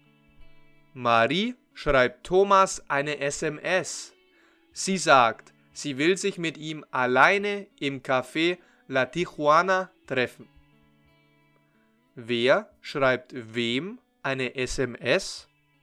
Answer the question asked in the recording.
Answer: Marie an Thomas. Marie schreibt Thomas eine SMS.